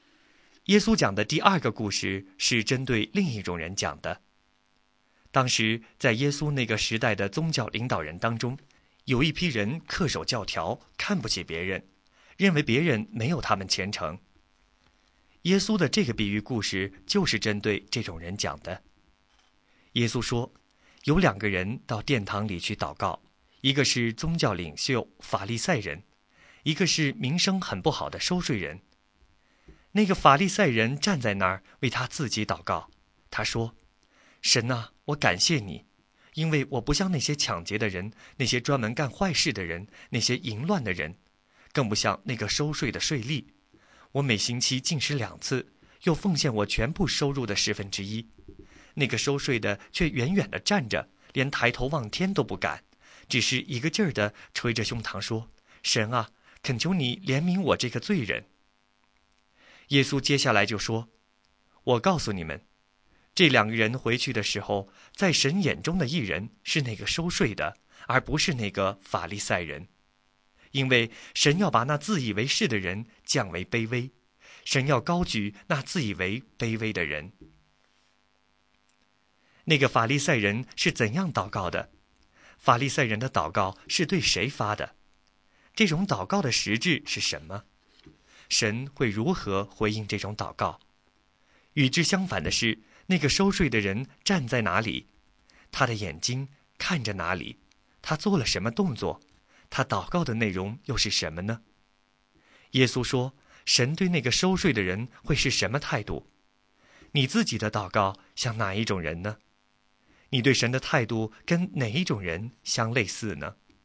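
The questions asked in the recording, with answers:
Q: 那个法利赛人是怎样祷告的?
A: 站着为自己祷告,夸耀自己,看不起别人

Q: 那个收税的人站在哪里?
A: 远远地站着

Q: 他做了什么动作?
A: 捶着胸膛

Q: 他祷告的内容又是什么呢?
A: 神啊,恳求你怜悯我这个罪人

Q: 耶稣说,神对那个收税的人会是什么态度?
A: 认他为义人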